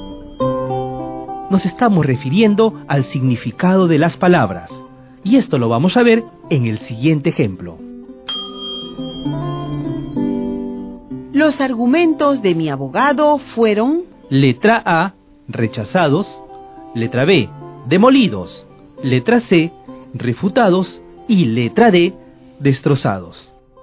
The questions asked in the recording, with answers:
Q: Los argumentos de mi abogado fueron...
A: Es la alternativa C, Pedro.